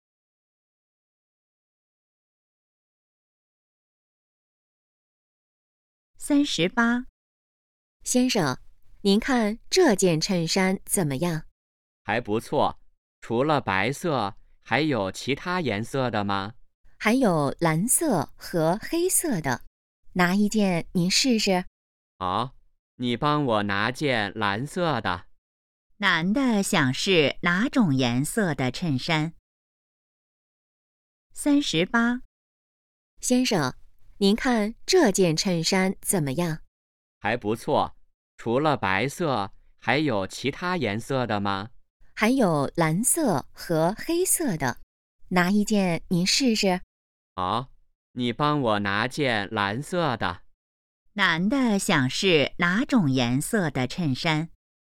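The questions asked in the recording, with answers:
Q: 男的想试哪种颜色的衬衫?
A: 蓝色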